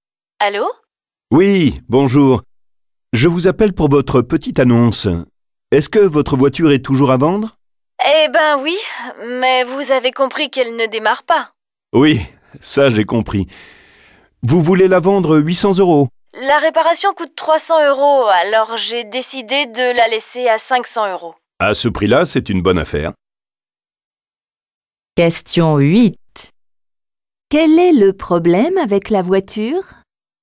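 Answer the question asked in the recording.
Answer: Elle ne démarre pas.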